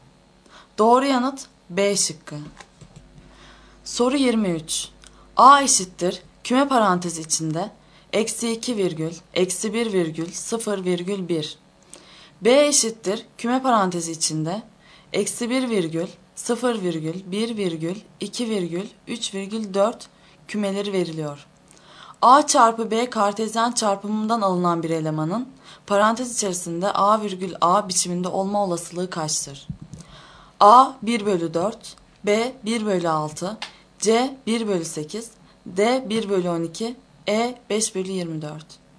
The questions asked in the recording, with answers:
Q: A çarpı B kartezyen çarpımından alınan bir elemanın parantez içerisinde A virgül A biçiminde olma olasılığı kaçtır?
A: Doğru yanıt C şıkkı.